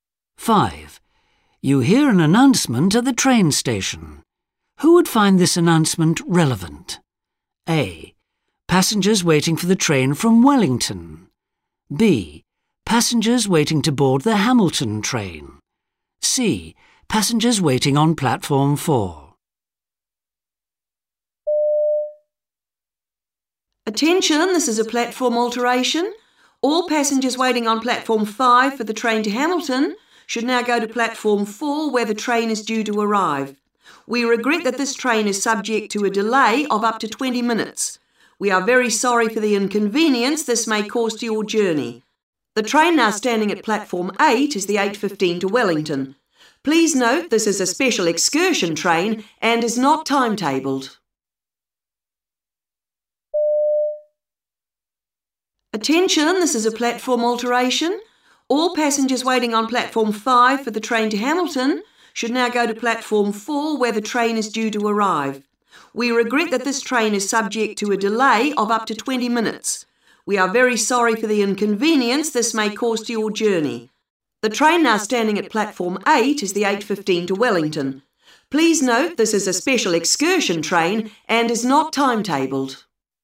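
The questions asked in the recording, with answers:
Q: Who would find this announcement relevant?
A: B: Passengers waiting to board the Hamilton train.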